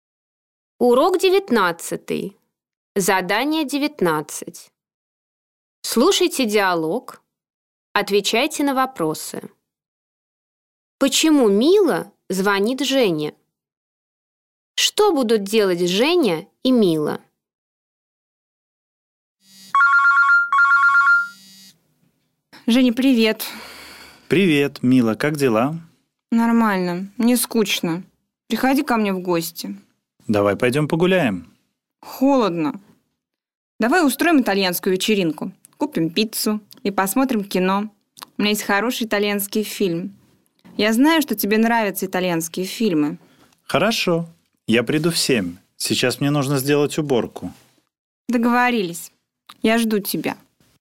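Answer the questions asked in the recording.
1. Ей скучно, она приглашает Женю в гости.
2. Устроят итальянскую вечеринку: купят пиццу и посмотрят итальянский фильм.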